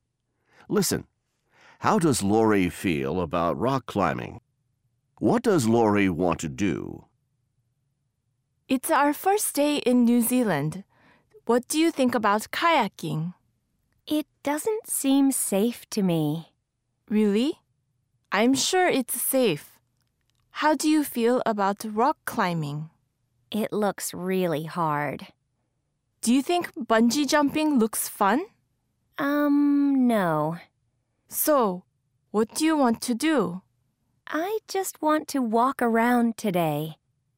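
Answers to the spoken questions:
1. She thinks it looks really hard.
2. She just wants to walk around today.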